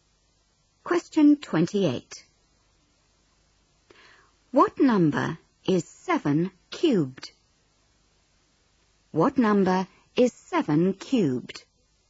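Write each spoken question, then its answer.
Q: What number is 7 cubed?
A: 343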